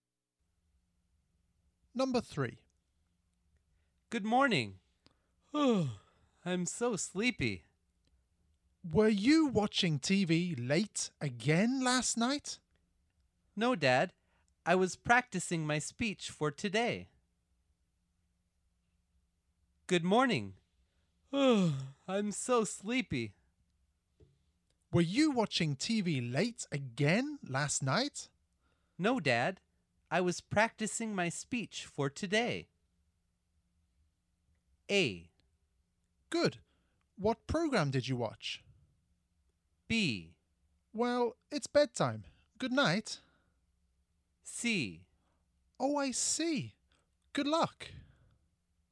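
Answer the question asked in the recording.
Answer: C: Oh, I see. Good luck.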